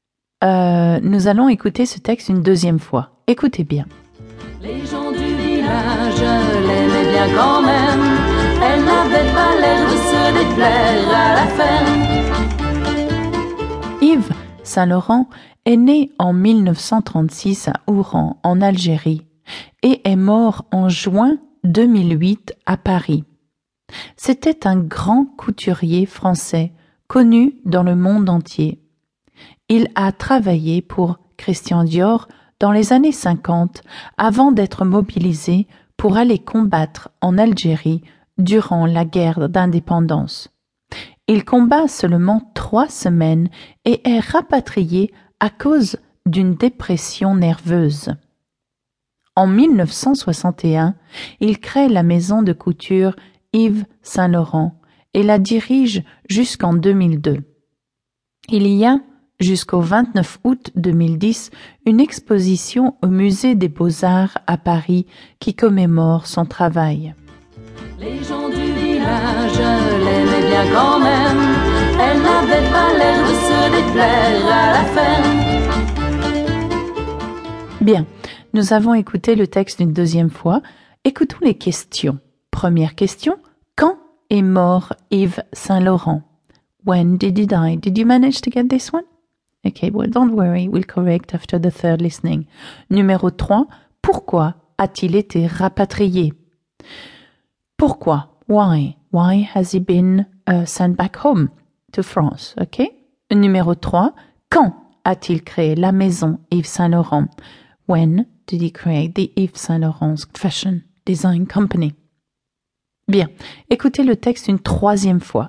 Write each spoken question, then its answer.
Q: Quand est mort Yves Saint-Laurent?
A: Yves Saint Laurent est mort en juin 2008.

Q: Pourquoi a-t-il été rapatrié?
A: il est rapatrié à cause d'une dépression nerveuse.

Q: quand a-t-il créé la maison Yves Saint Laurent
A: That's right, 1961, 1962, 1961.